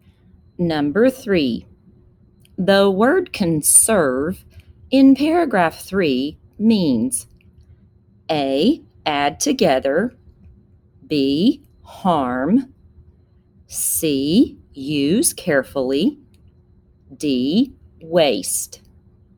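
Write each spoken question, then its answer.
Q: the word conserve in paragraph three means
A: C: use carefully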